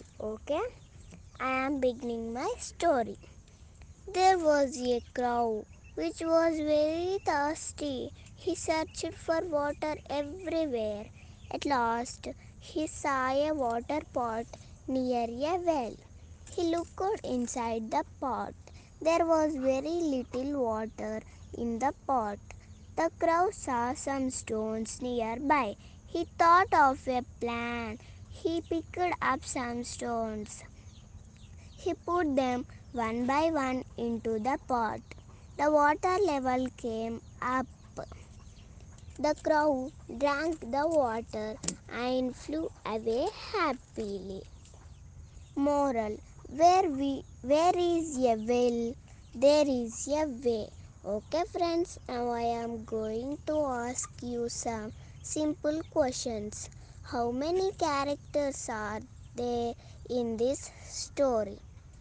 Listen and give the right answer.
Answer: Okay, very good, you are correct only one character is in this story.